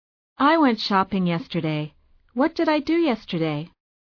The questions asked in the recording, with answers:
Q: What did I do yesterday?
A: You went shopping.